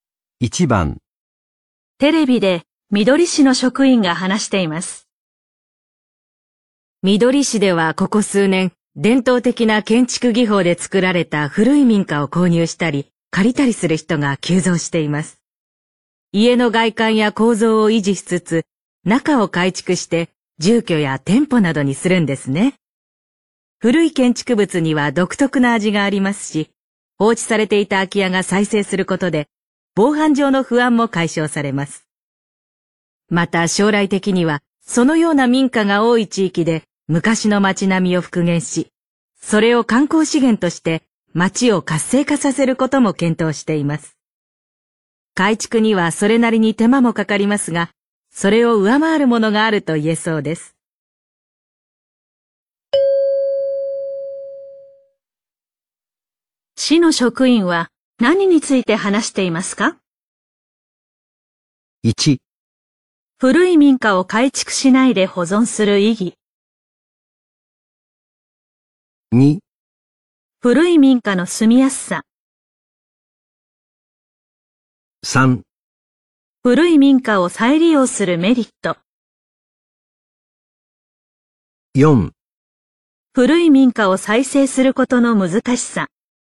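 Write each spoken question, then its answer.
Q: 市の職員は何について話していますか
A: 3: 古い民家を再利用するメリット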